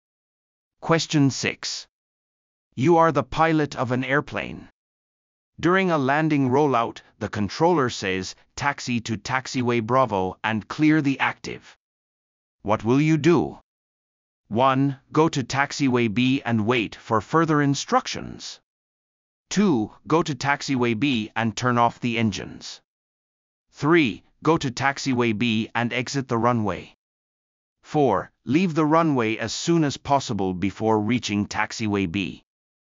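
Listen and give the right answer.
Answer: 3: Go to taxiway B and exit the runway.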